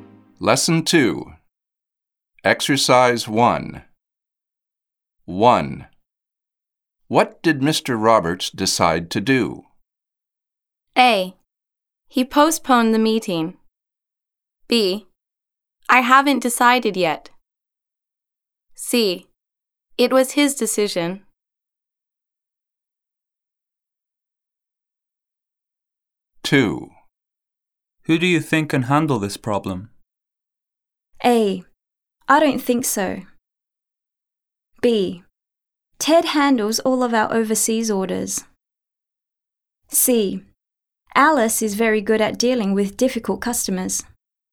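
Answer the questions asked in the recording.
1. A: He postponed the meeting.
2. C: Alice is very good at dealing with difficult customers.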